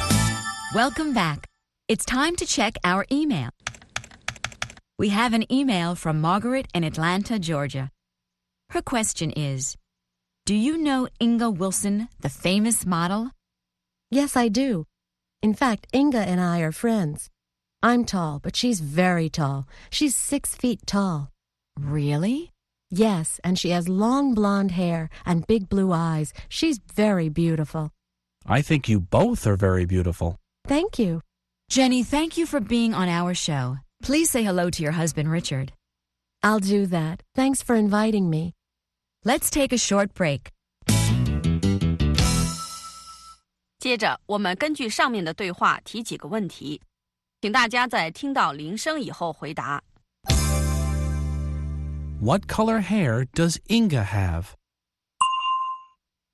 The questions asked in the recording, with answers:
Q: What color hair does Inga have?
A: Inga has blonde hair.